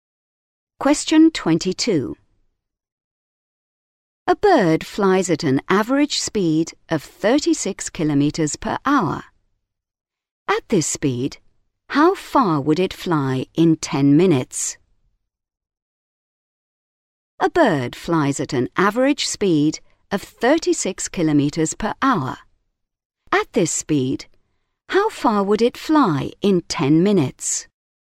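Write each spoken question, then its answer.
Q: At this speed, how far would it fly in 10 minutes?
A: 6 kilometres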